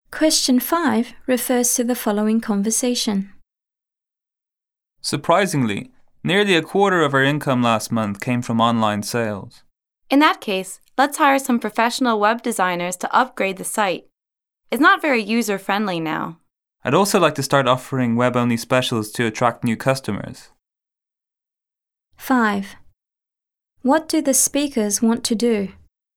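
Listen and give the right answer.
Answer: Hire professional web designers to upgrade their website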